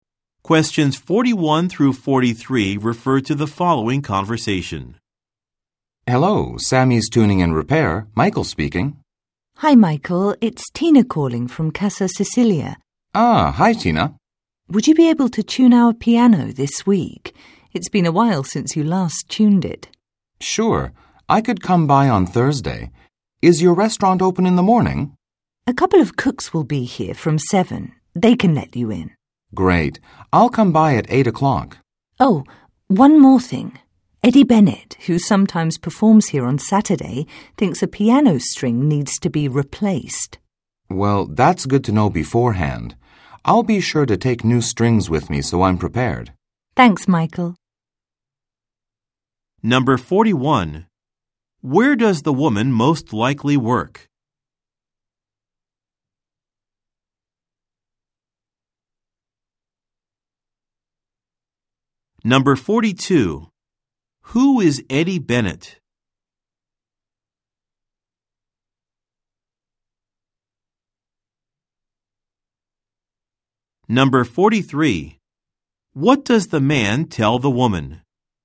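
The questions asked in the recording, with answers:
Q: Where does the woman most likely work?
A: At a restaurant

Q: Who is Eddie Bennett?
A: A musician who sometimes performs there

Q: What does the man tell the woman?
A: He will bring new strings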